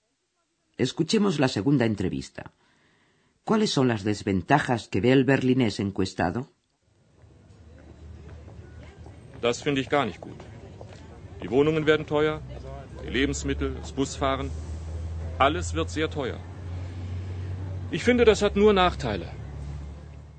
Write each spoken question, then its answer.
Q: ¿Cuáles son las desventajas que ve el berlinés encuestado?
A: Todo será más caro.